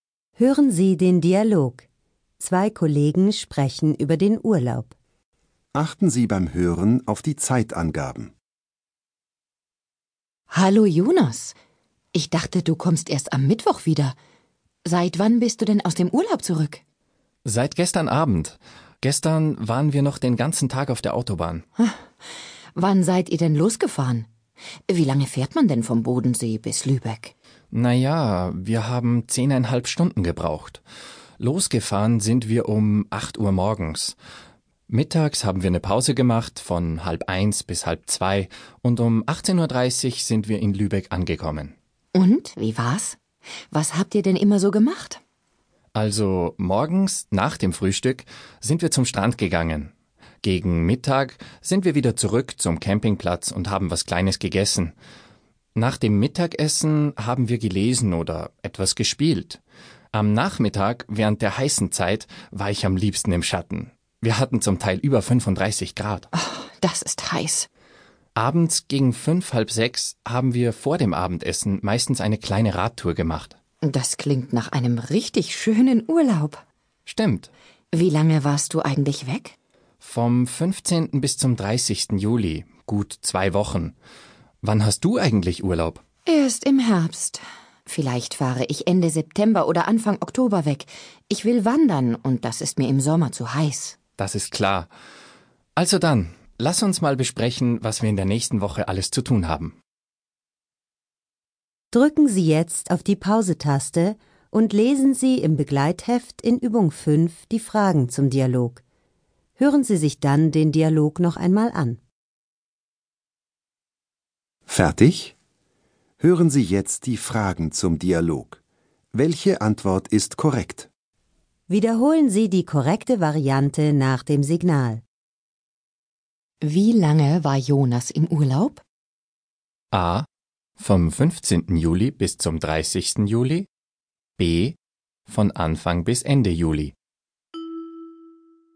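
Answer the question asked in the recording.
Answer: A: Vom 15. Juli bis zum 30. Juli.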